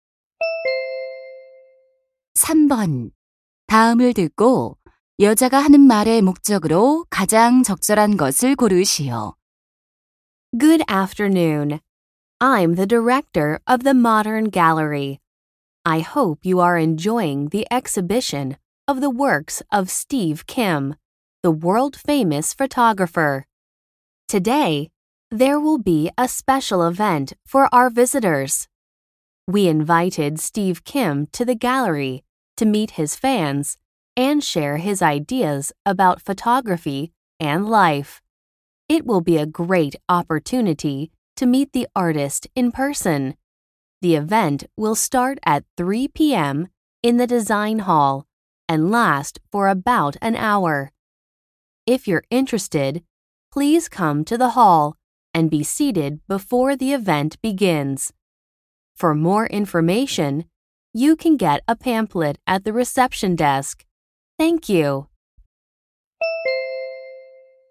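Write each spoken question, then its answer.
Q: 다음을 듣고 여자가 하는 말의 목적으로 가장 적절한 것을 고르시오.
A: 사진작가 Steve Kim과의 만남 행사를 안내하려고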